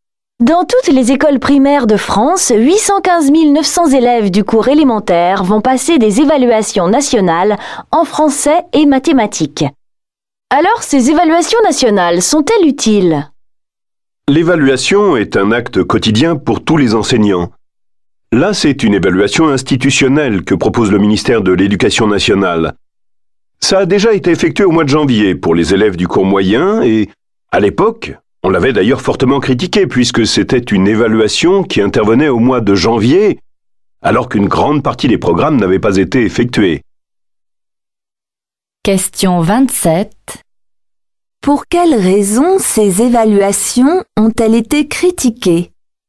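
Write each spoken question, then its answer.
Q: Pour quelles raisons ces évaluations ont-elles été critiquées?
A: Elles avaient lieu en janvier, alors qu'une grande partie des programmes n'avaient pas encore été faits.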